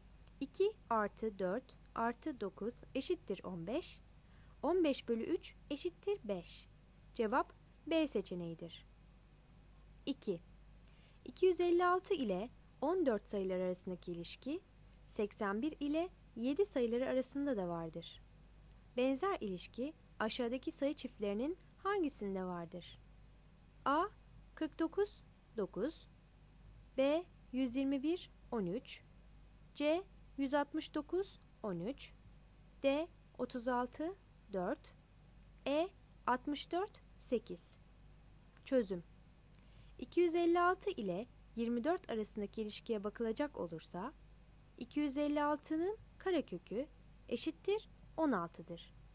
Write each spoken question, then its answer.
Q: Benzer ilişki aşağıdaki sayı çiftlerinin hangisinde vardır?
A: Cevap D seçeneğidir.